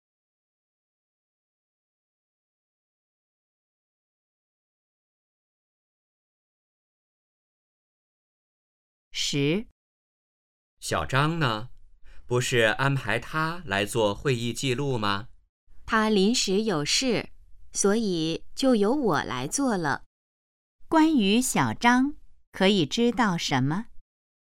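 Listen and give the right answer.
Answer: 他临时有事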